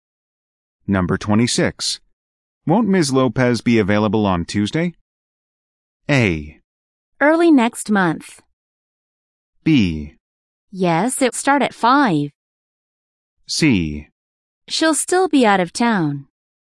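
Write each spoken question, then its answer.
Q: Won't Ms. Lopez be available on Tuesday?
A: C: She'll still be out of town.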